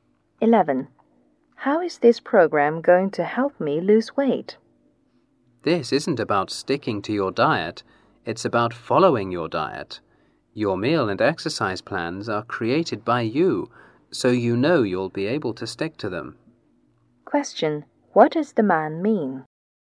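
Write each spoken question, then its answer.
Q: What does the man mean?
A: The user creates the meal and exercise plans, so they are achievable and easy to stick to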